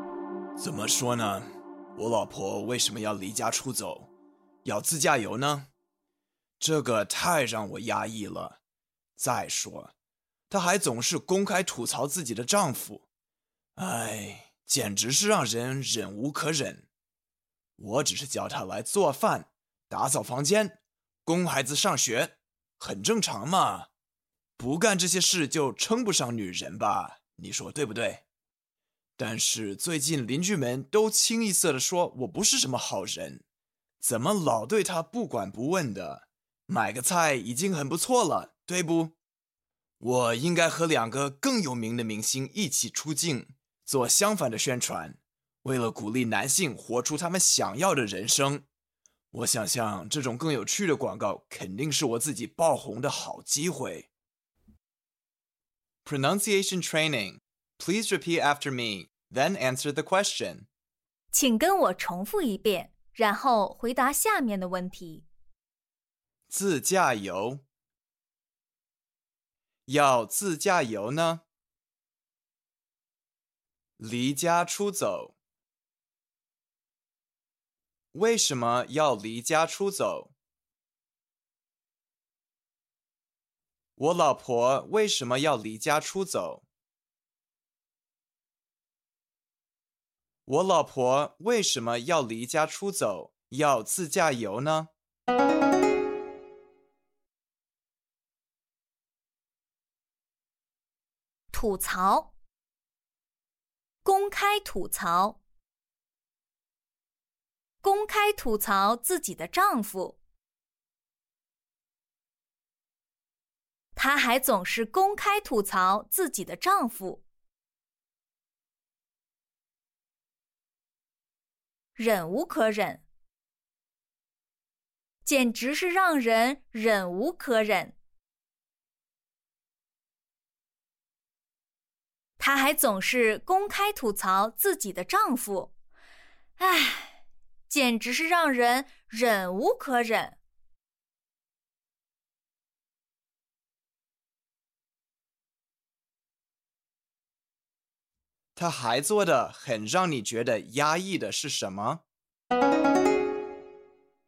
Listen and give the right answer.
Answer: 他还总是公开吐槽自己的丈夫,唉,简直让人忍无可忍。